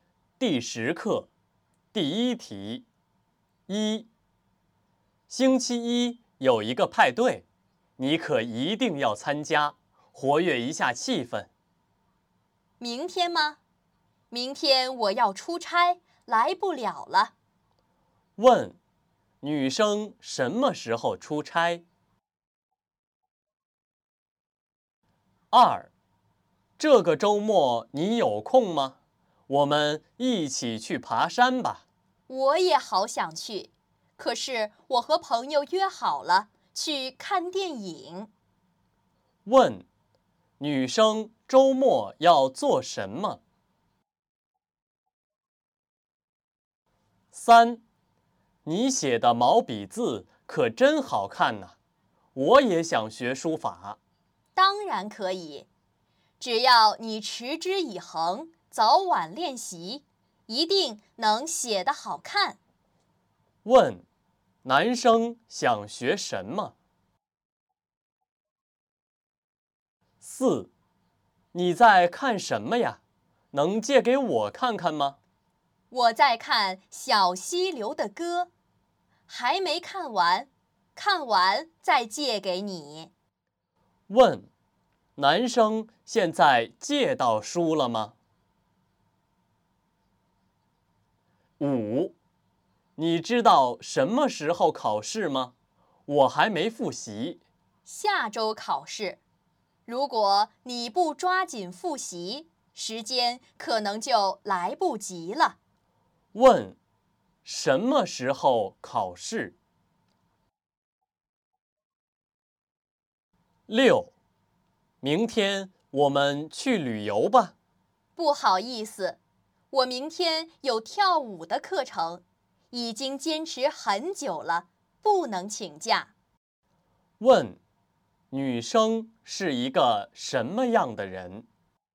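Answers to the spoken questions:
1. 明天
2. 和朋友去看电影
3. 书法
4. 没有
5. 下周
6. 能坚持、有毅力的人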